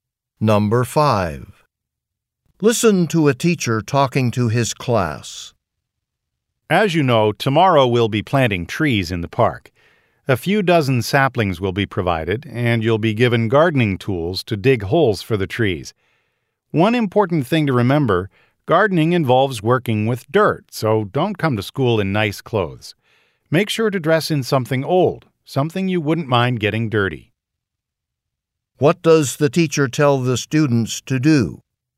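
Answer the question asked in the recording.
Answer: Wear old clothes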